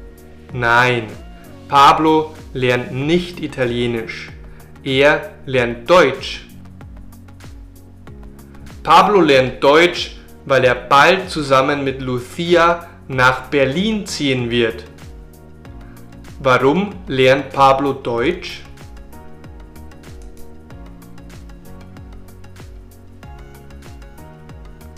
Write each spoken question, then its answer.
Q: Warum lernt Pablo Deutsch?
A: Weil er bald zusammen mit Lucia nach Berlin ziehen wird.